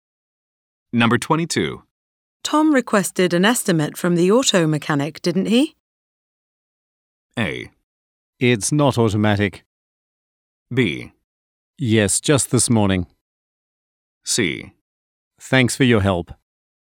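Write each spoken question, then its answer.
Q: Tom requested an estimate from the auto mechanic, didn't he?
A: B: Yes, just this morning.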